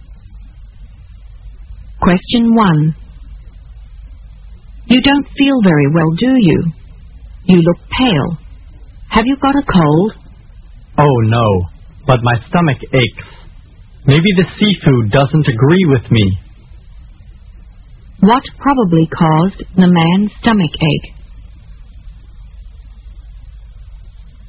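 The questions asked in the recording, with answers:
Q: What probably caused the man's stomach ache?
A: The seafood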